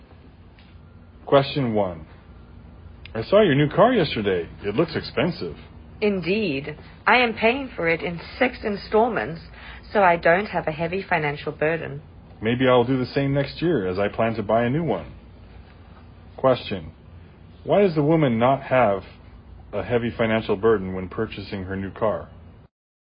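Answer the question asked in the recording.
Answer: She is paying for it in 6 installments.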